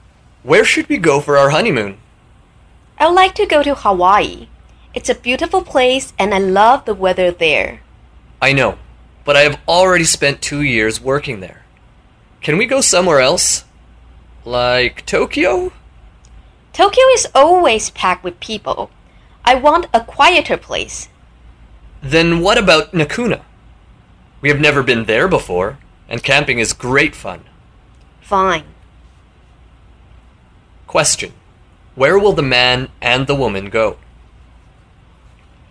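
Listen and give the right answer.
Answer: Nakuna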